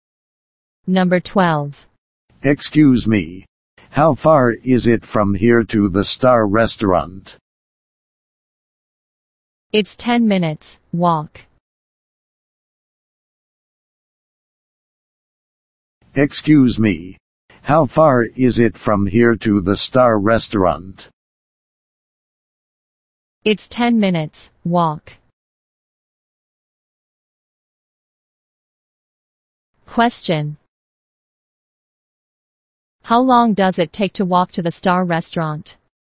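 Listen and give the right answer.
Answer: 10 minutes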